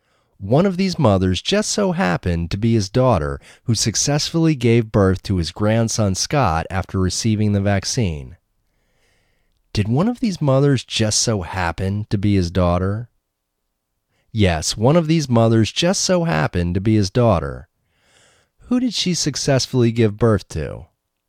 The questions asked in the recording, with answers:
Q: Who did she successfully give birth to?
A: She successfully gave birth to his grandson Scott.